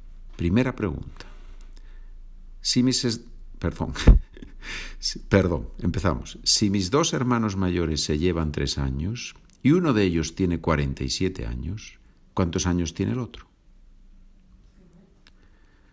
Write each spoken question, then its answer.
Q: Si mis dos hermanos mayores se llevan tres años y uno de ellos tiene 47 años, ¿cuántos años tiene el otro?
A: Una posibilidad es que tenga 50 años.